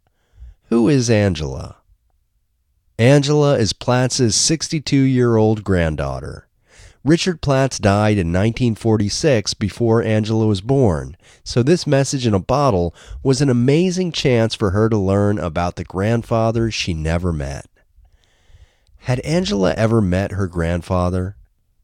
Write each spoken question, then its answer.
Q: Had Angela ever met her grandfather?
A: No, Angela had never met her grandfather.